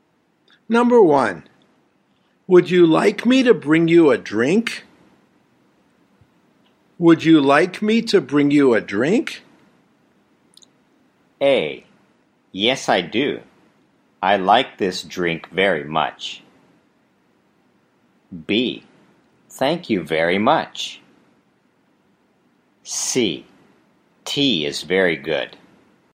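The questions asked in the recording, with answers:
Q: would you like me to bring you a drink?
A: B: Thank you very much.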